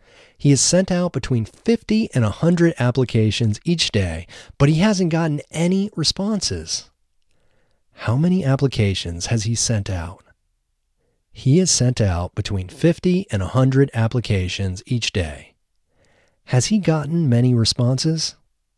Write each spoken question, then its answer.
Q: How many applications has he sent out?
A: He has sent out between 50 and 100 applications each day.

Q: Has he gotten many responses?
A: No, he hasn't gotten any responses.